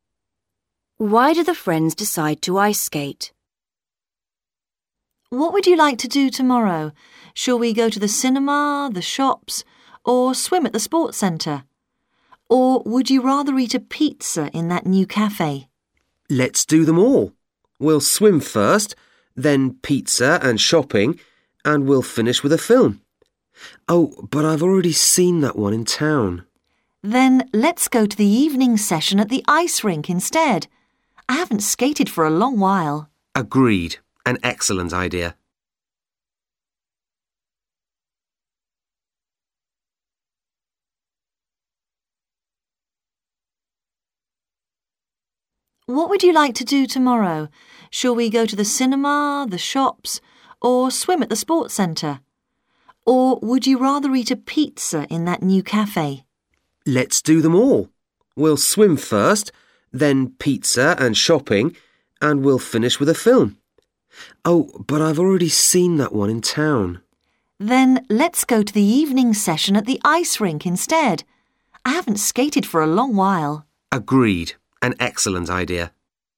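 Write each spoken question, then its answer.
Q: Why do the friends decide to ice skate?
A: One of them has already seen the film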